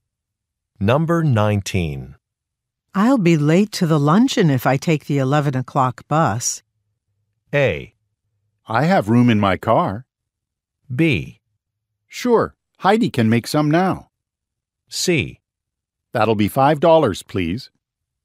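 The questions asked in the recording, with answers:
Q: I'll be late to the luncheon if I take the 11 o'clock bus.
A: A: I have room in my car.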